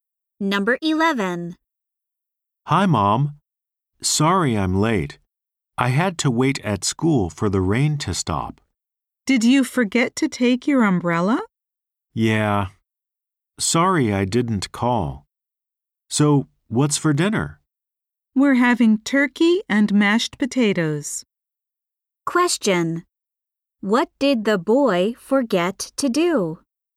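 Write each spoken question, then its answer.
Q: What did the boy forget to do?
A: Take his umbrella.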